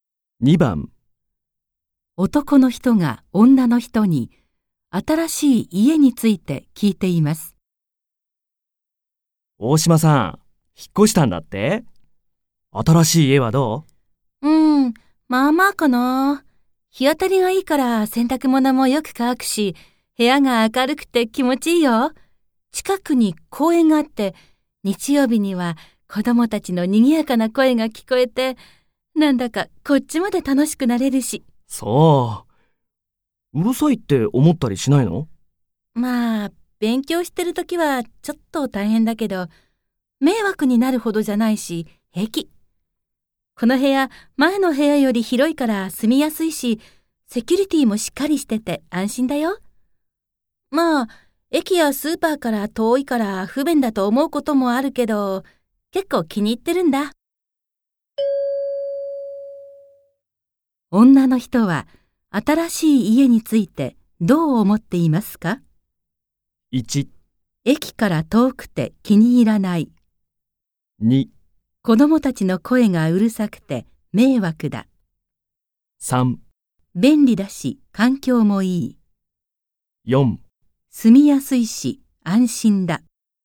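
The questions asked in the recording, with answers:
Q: 女の人は新しい家についてどう思っていますか ?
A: 4: 住みやすいし安心だ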